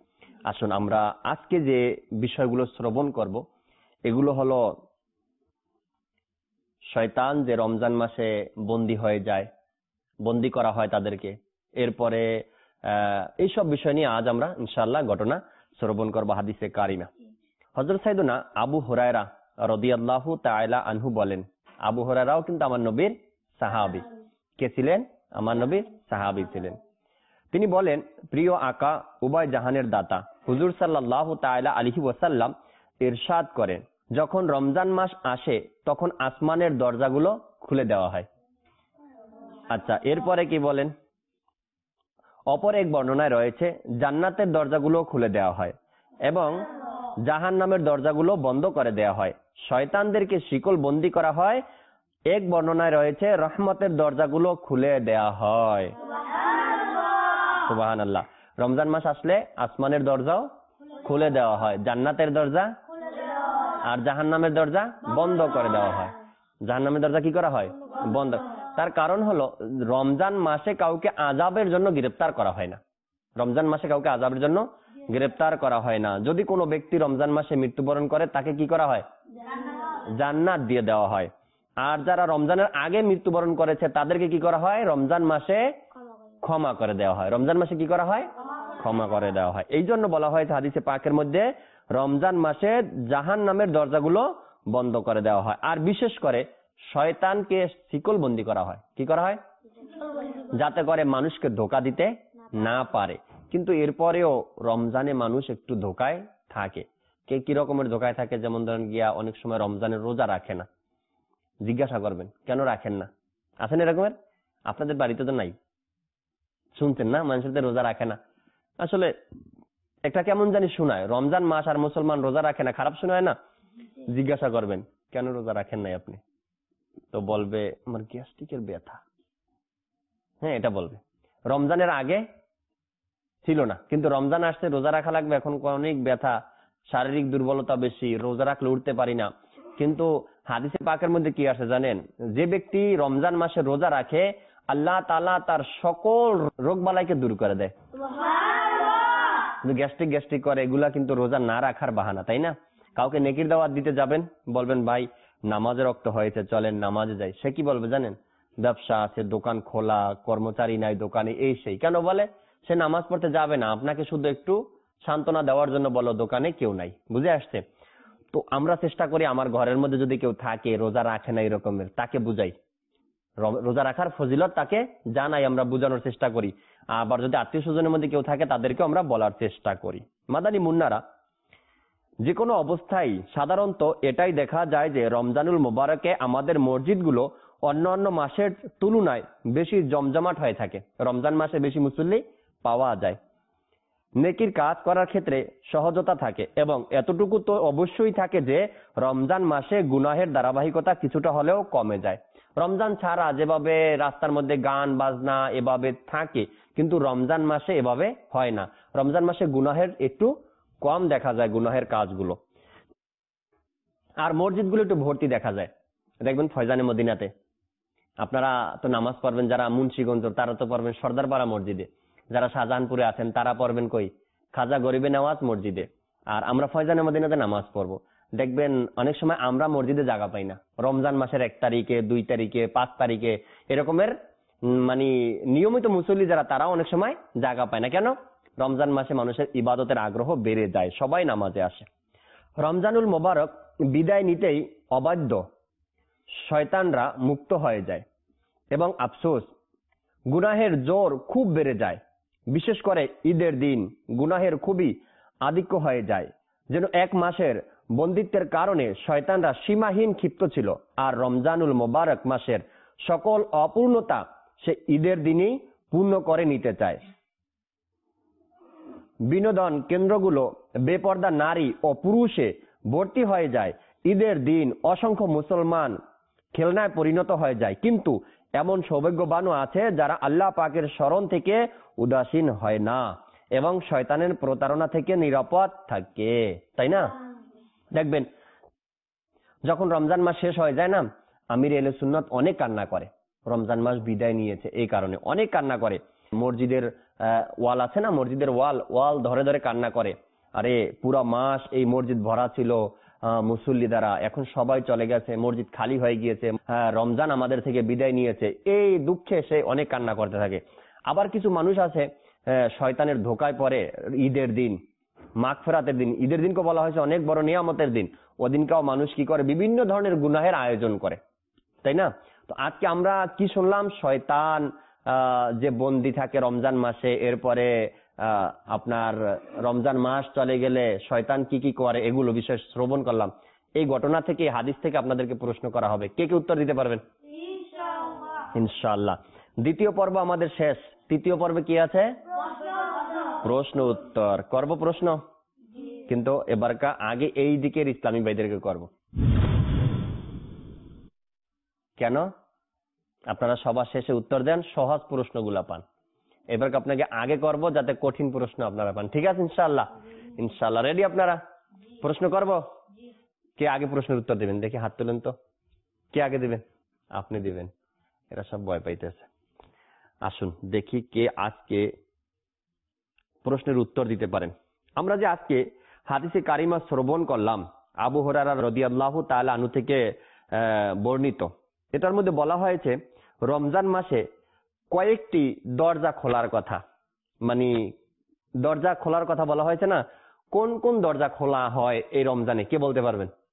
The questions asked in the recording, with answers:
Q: এটার মধ্যে বলা হয়েছে রমজান মাসে কয়েকটি দরজা খোলার কথা, মানে দরজা খোলার কথা বলা হয়েছে না, কোন কোন দরজা খোলা হয় এই রমজানে কে বলতে পারবেন?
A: হ্যাঁ, জান্নাতের দরজা খুলে দেওয়া হয়, আসমানের দরজা খুলে দেওয়া হয়, আর রহমতের দরজা খুলে দেওয়া হয়।